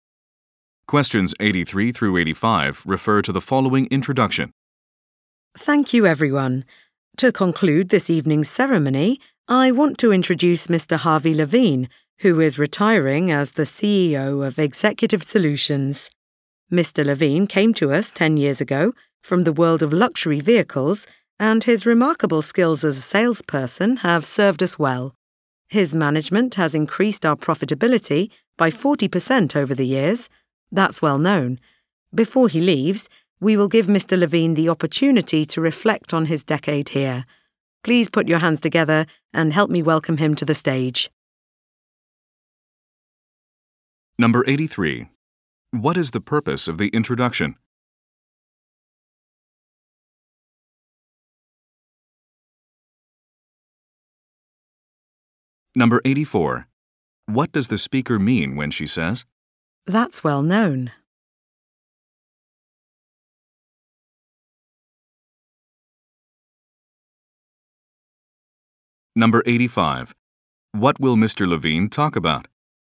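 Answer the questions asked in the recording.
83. To introduce a retiring CEO, Harvey Levine
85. His decade at the company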